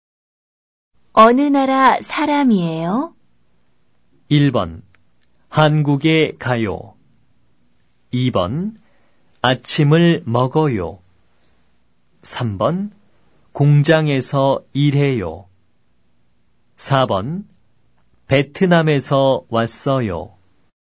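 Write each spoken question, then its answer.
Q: 어느 나라 사람이에요?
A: 4번: 베트남에서 왔어요.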